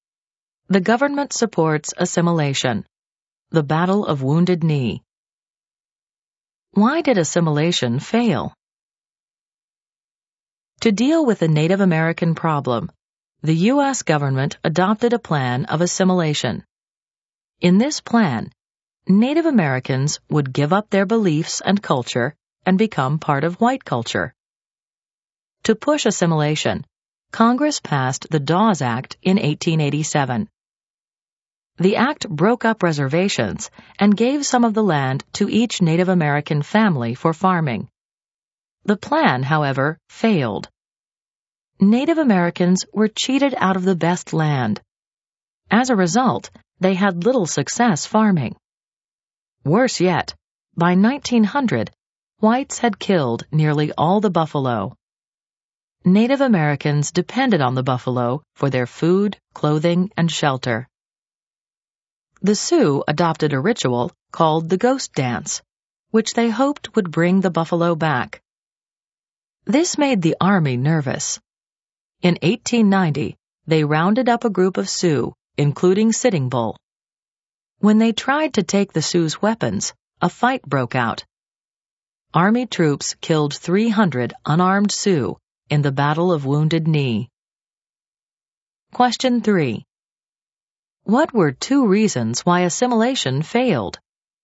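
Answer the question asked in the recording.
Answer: Native Americans were cheated out of the best land, so farming failed, and whites had killed nearly all the buffalo.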